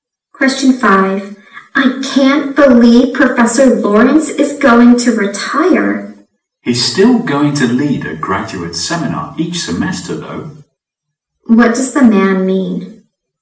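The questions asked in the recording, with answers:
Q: What does the man mean?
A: Professor Lawrence will still lead a graduate seminar each semester.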